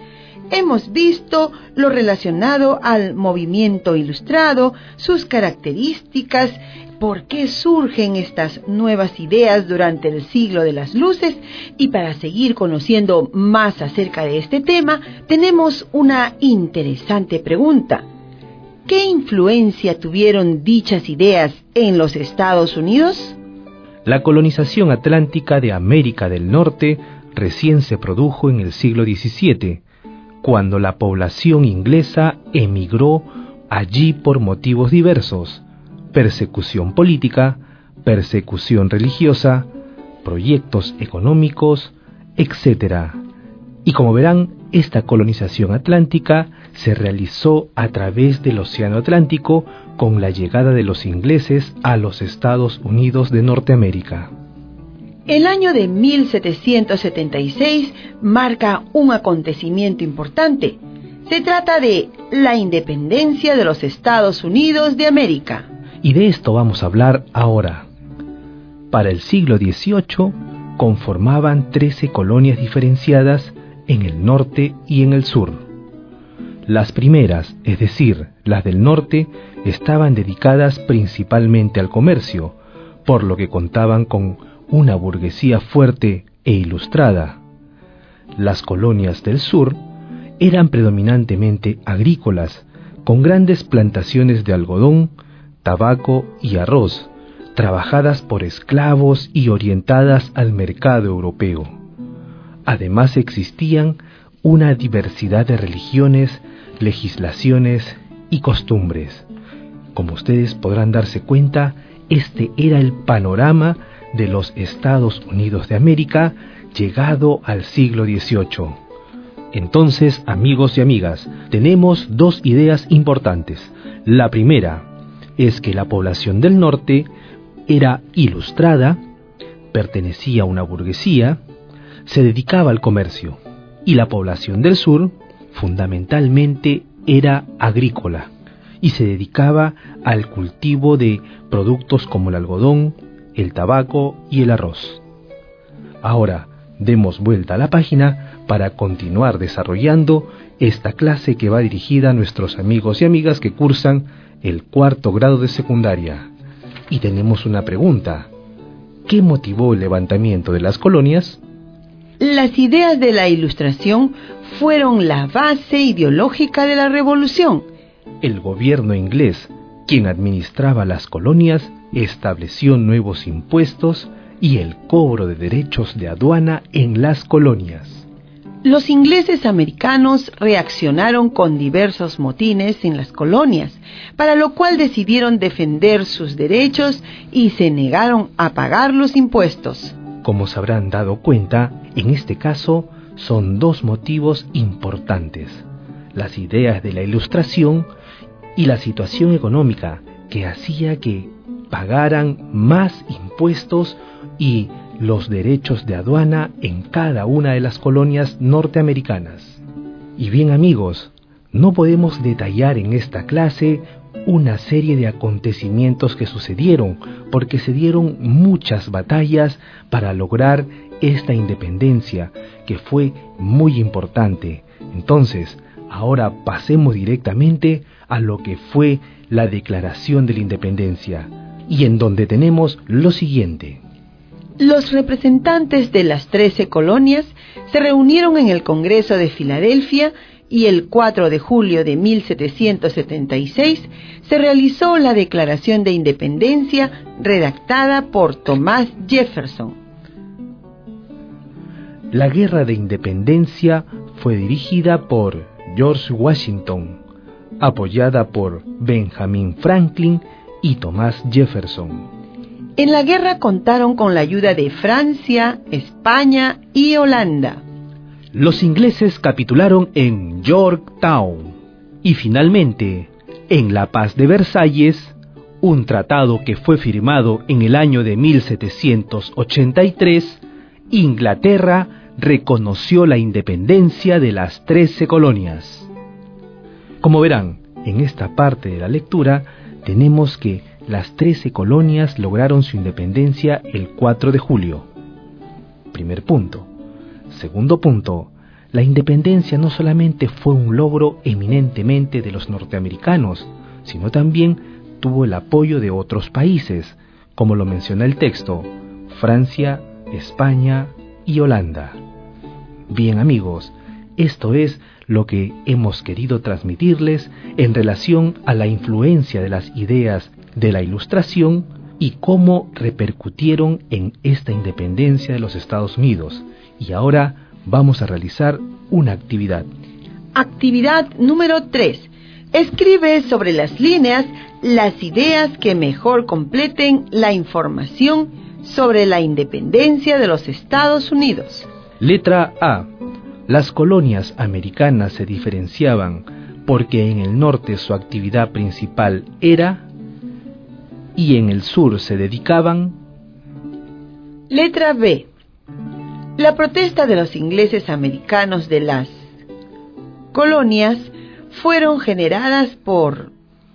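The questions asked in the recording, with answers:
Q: las colonias americanas se diferenciaban porque en el norte su actividad principal era y en el sur se dedicaban.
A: En el norte, el comercio; en el sur, la agricultura (plantaciones de algodón, tabaco y arroz)

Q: La protesta de los ingleses americanos de las colonias fueron generadas por...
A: Los nuevos impuestos y el cobro de derechos de aduana establecidos por el gobierno inglés (y las ideas de la Ilustración)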